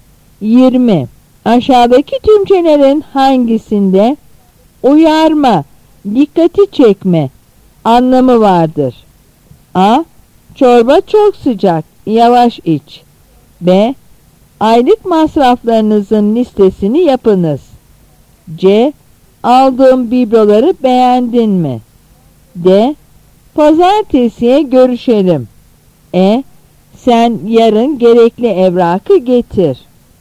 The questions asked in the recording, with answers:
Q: Aşağıdaki tümçelerin hangisinde uyarma, dikkati çekme anlamı vardır?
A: Yanıt A.